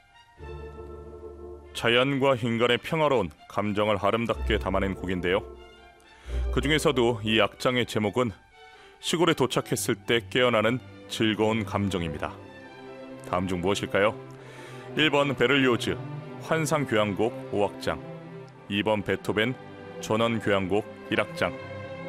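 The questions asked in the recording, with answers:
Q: 다음 중 무엇일까요? 1번 베를리오즈 환상교향곡 5악장, 2번 베토벤 전원교향곡 1악장.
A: 2번: 베토벤 전원교향곡 1악장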